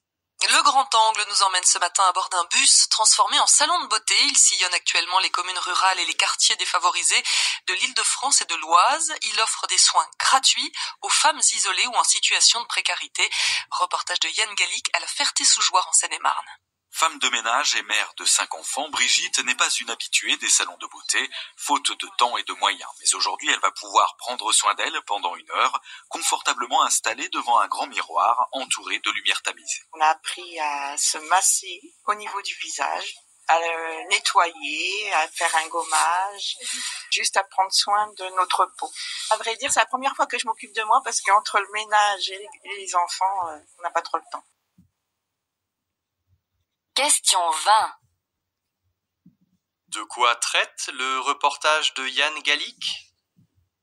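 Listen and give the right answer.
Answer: D'un bus transformé en salon de beauté qui offre des soins gratuits aux femmes isolées ou en situation de précarité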